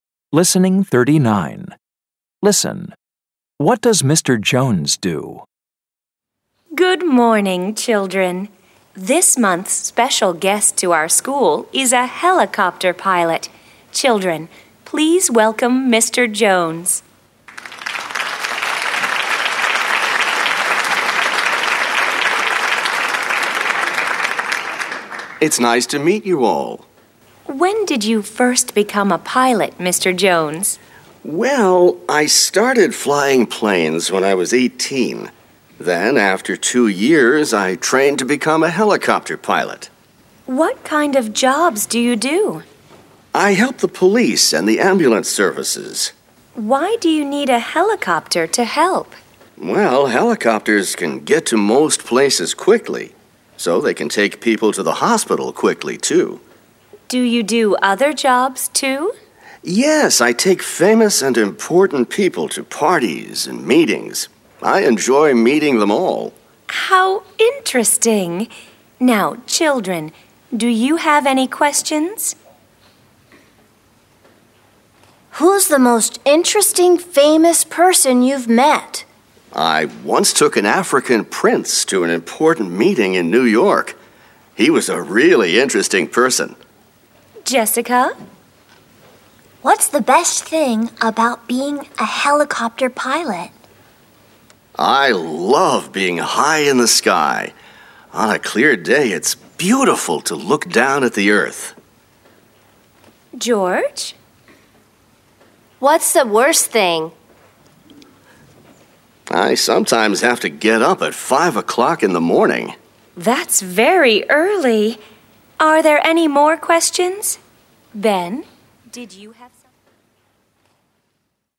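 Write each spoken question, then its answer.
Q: What does Mr. Jones do?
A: He is a helicopter pilot.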